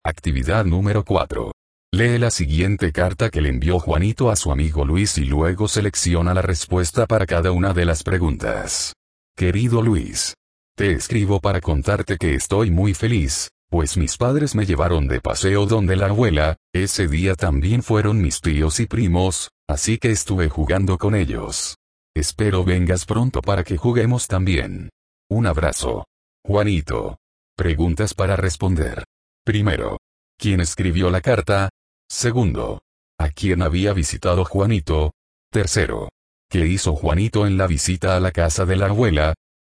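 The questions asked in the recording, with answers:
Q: ¿Quién escribió la carta?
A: Juanito

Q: ¿A quién había visitado Juanito?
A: A su abuela

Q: ¿Qué hizo Juanito en la visita a la casa de la abuela?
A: Jugó con sus primos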